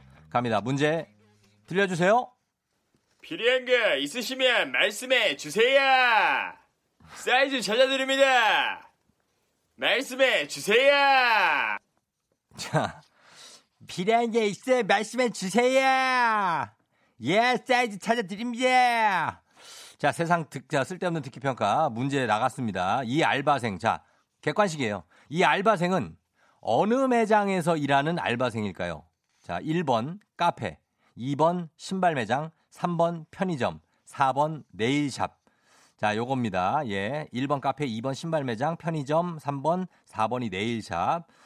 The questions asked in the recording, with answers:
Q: 이 알바생, 자, 객관식이에요. 이 알바생은 어느 매장에서 일하는 알바생일까요?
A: 정답은 바로 바로 2번 신발 매장이었습니다.